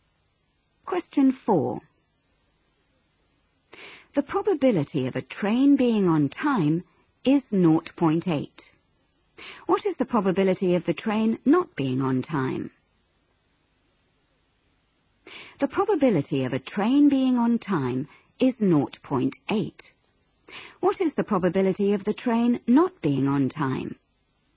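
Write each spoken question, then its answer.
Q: What is the probability of the train not being on time?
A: 0.2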